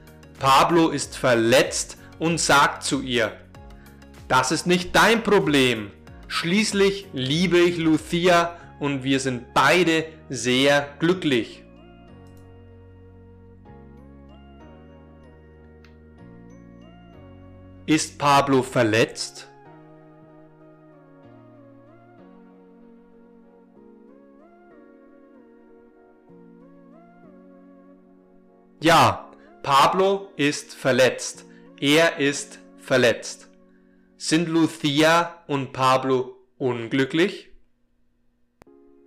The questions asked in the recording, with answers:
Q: Sind Lucia und Pablo unglücklich?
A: Nein, Lucia und Pablo sind glücklich.